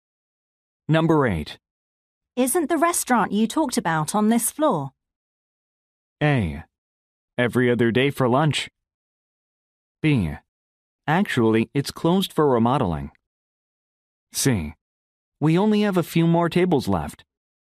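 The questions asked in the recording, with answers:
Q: Isn't the restaurant you talked about on this floor?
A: B: Actually, it's closed for remodeling.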